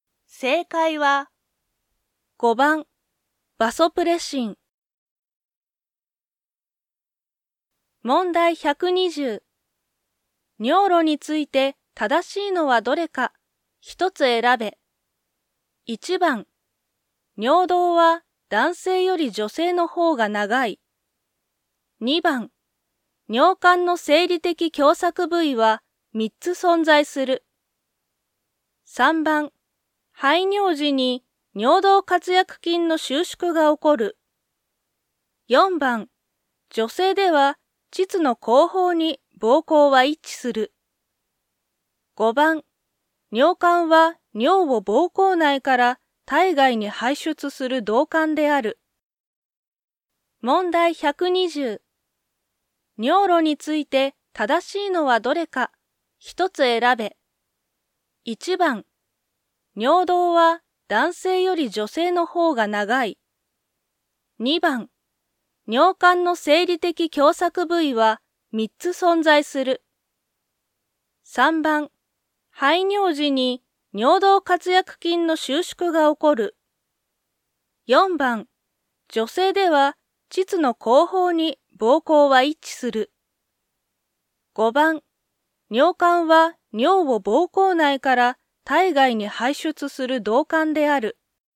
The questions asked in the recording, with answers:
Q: 尿路について正しいのはどれか、一つ選べ。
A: 2番、尿管の生理的狭窄部位は3つ存在する。